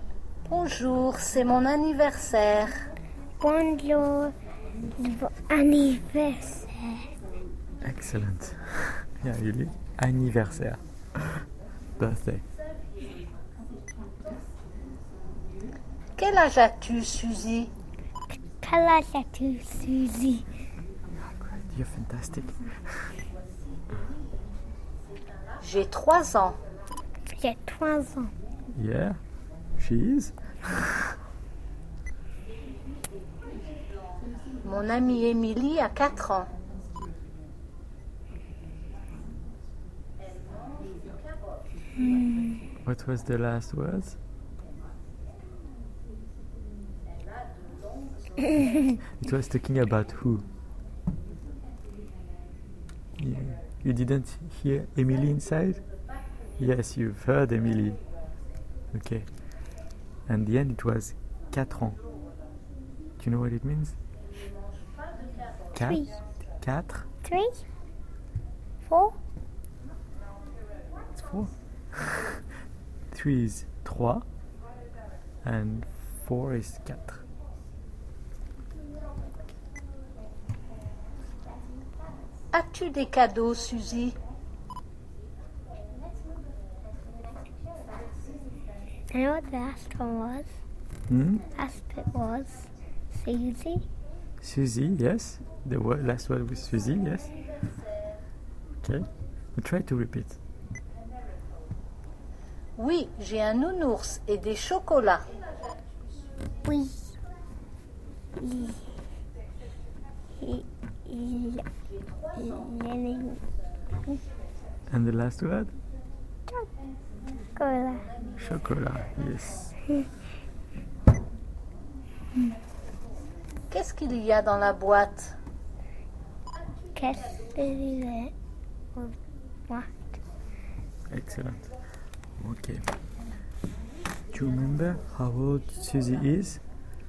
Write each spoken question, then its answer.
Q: Do you remember how old Susie is?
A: Three.